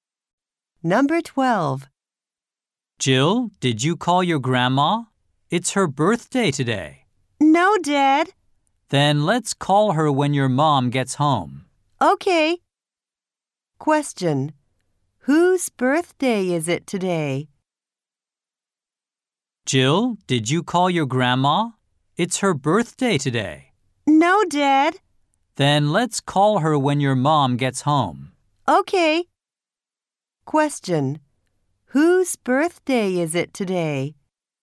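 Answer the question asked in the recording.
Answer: Jill's grandma's.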